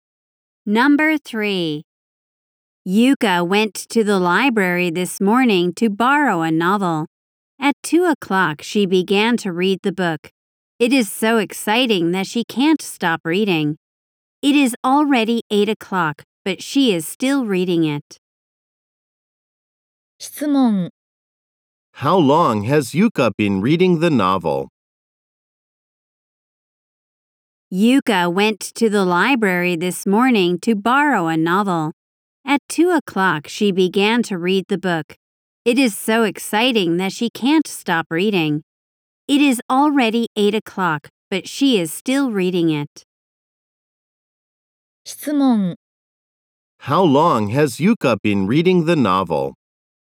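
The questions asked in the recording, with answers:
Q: How long has Yuka been reading the novel?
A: For 6 hours.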